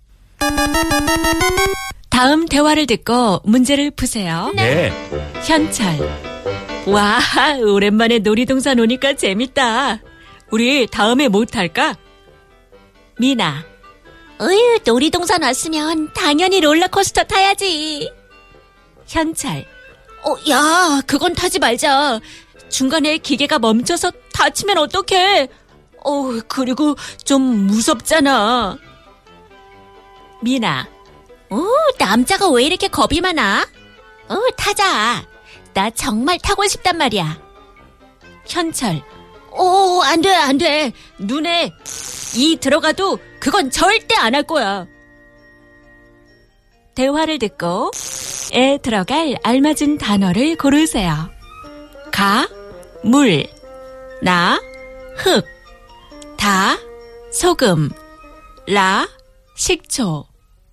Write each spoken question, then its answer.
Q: 대화를 듣고 에 들어갈 알맞은 단어를 고르세요.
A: 눈에 흙이 들어가도.